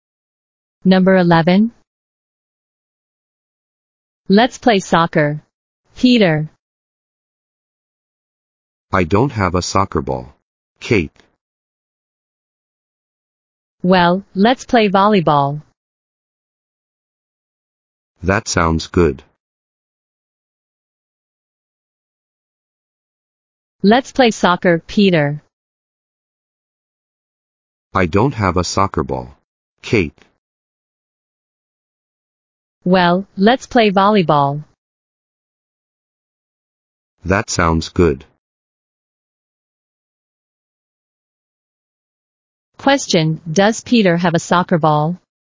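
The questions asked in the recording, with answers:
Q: Question, does Peter have a soccer ball?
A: No, he doesn't.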